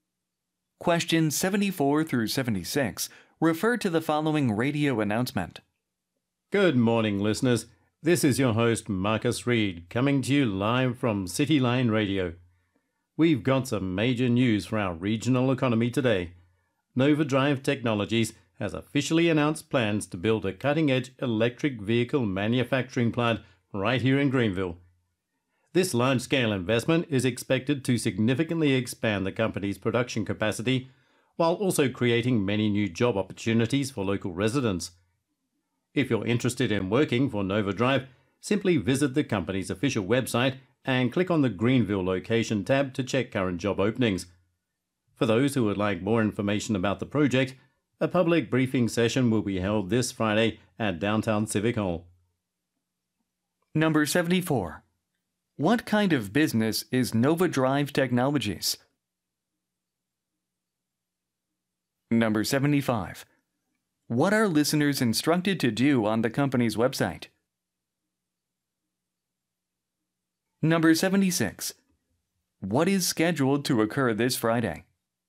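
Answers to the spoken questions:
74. An electric vehicle manufacturer
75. Click the Greenville location tab to check current job openings
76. A public briefing session at Downtown Civic Hall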